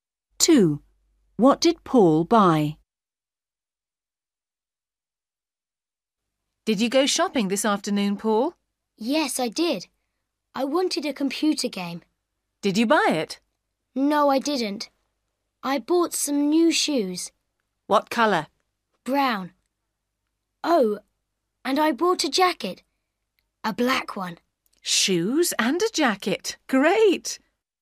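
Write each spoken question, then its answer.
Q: What did Paul buy?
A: Brown shoes and a black jacket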